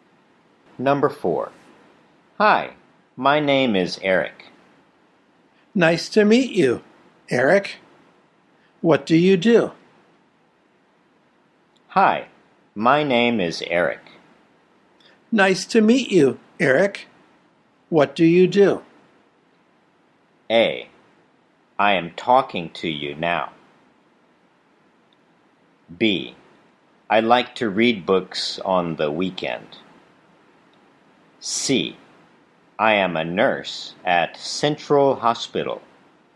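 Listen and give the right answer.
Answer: C: I am a nurse at Central Hospital.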